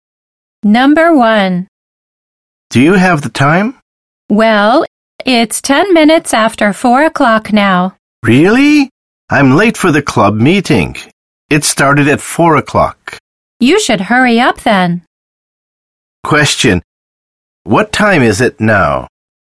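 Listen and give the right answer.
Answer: 4:10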